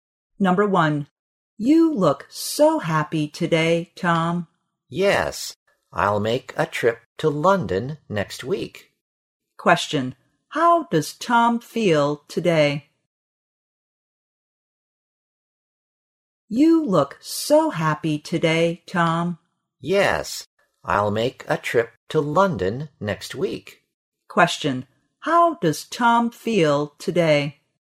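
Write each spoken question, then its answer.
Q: How does Tom feel today?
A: Happy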